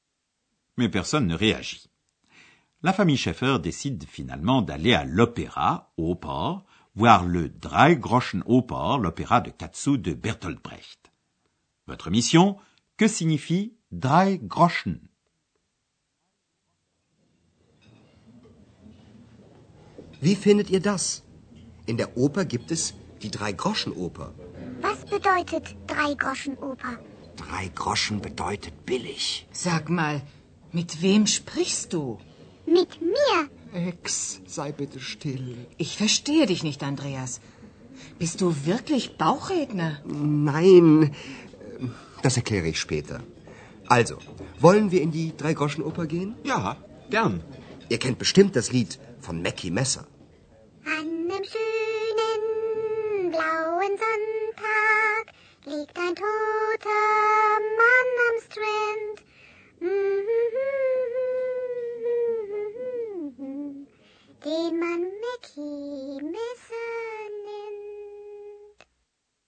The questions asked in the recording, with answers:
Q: Votre mission, que signifie Drei Groschen?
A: Drei Groschen, trois Groschen, l'équivalent de 4 sous, signifie bon marché.